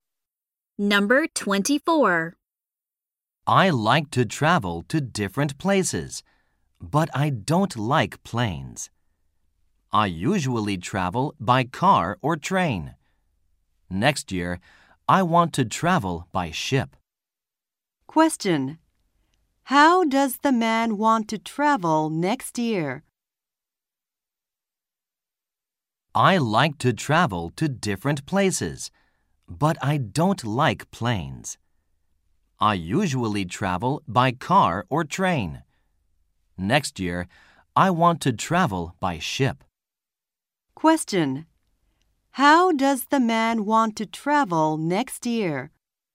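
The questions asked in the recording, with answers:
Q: How does the man want to travel next year?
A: By ship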